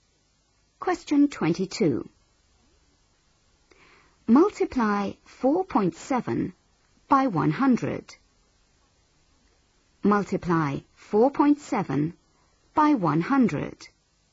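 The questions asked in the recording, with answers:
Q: Multiply 4.7 by 100.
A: 470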